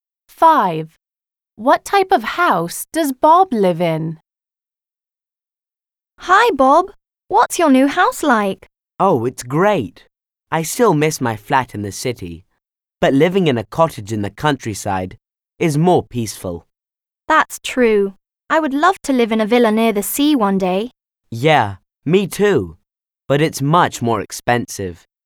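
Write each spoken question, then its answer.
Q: What type of house does Bob live in?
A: A cottage in the countryside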